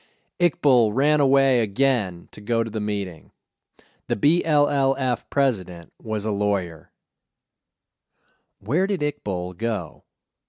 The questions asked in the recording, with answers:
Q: Where did Iqbal go?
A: Iqbal went to the BLLF meeting.